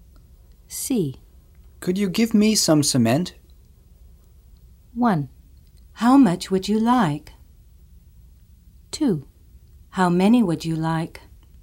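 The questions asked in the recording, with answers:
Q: Could you give me some cement?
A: 1: How much would you like?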